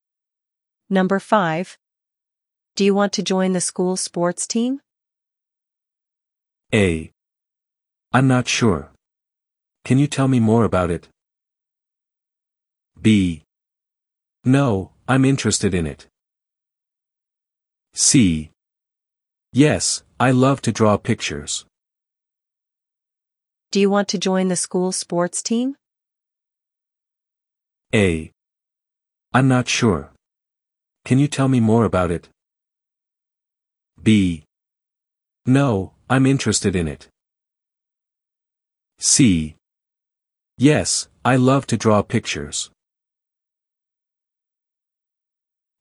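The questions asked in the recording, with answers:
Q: Do you want to join the school sports team?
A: A: I'm not sure. Can you tell me more about it?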